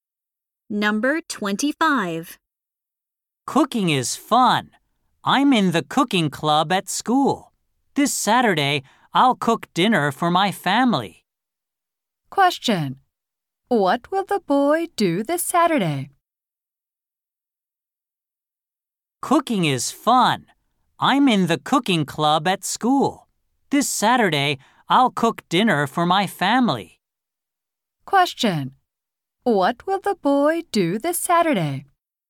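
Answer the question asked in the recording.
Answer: Cook dinner for his family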